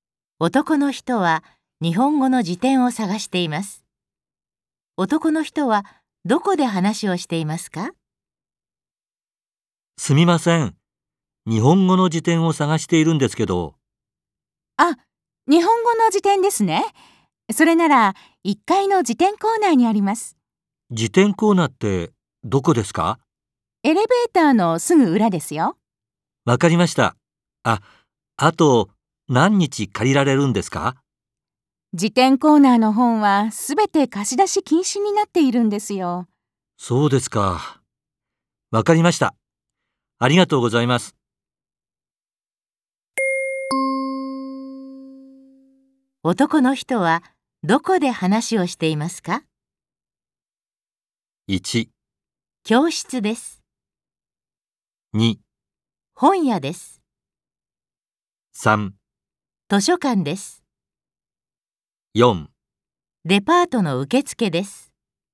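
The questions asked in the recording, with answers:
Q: 男の人はどこで話をしていますか?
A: 3: 図書館です。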